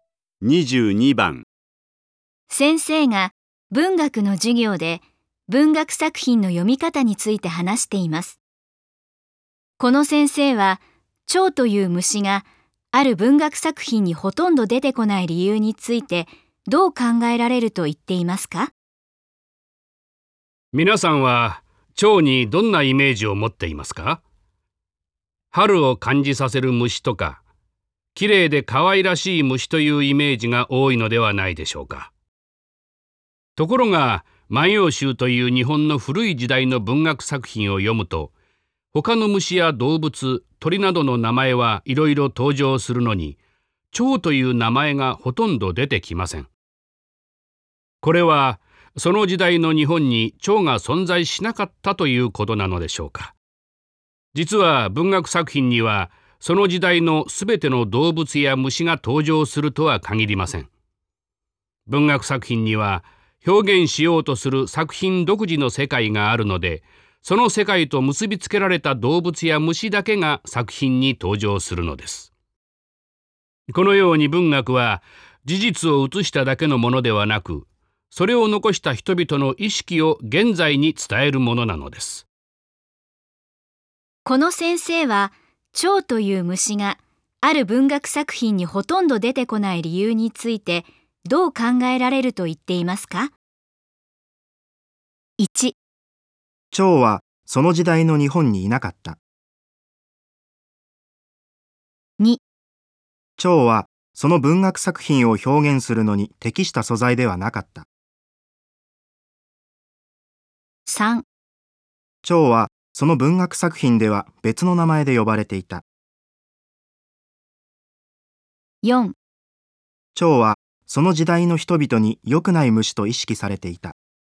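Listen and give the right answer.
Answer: 2: 蝶はその文学作品を表現するのに適した素材ではなかった。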